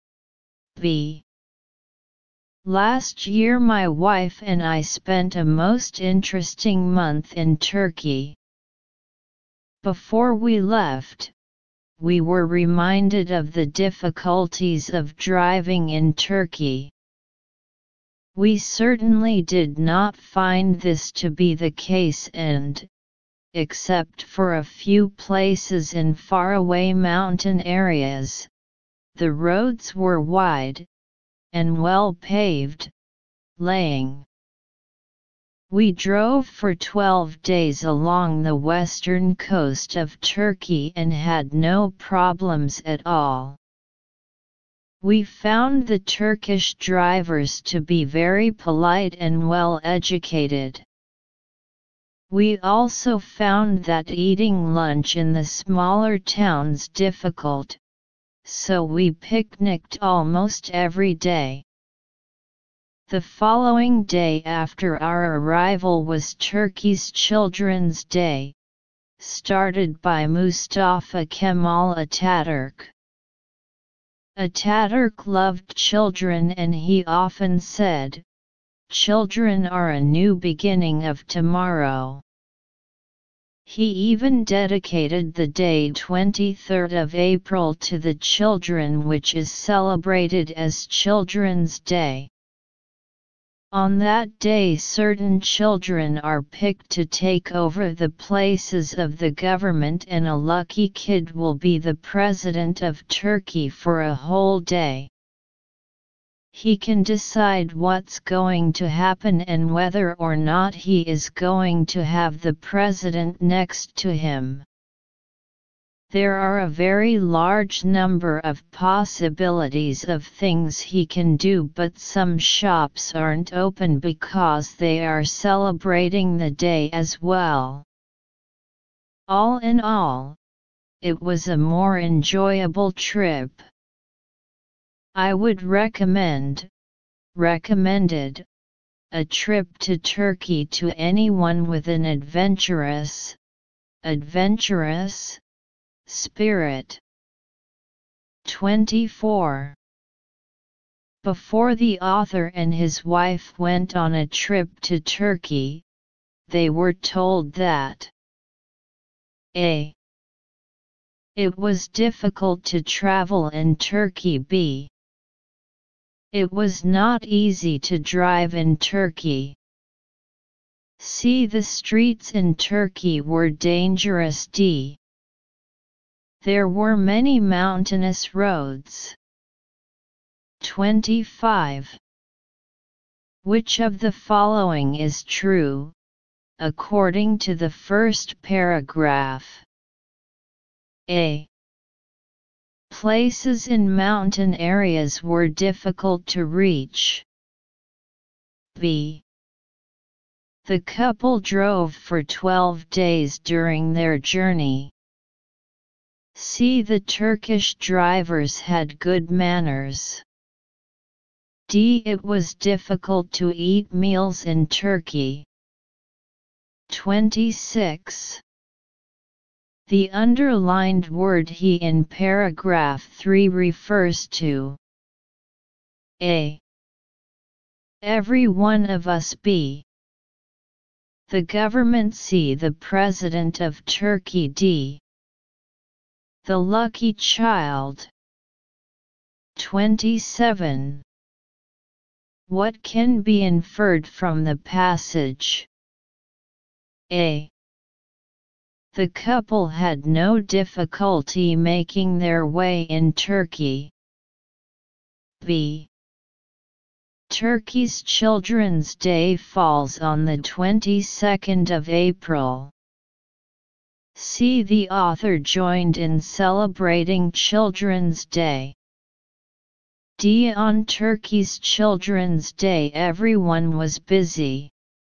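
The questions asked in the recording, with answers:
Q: Before the author and his wife went on a trip to Turkey, they were told that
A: B: it was not easy to drive in Turkey.

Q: Which of the following is true, according to the first paragraph?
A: C: The Turkish drivers had good manners.

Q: The underlined word he in paragraph 3 refers to.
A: D: the lucky child.

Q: What can be inferred from the passage?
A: A: The couple had no difficulty making their way in Turkey.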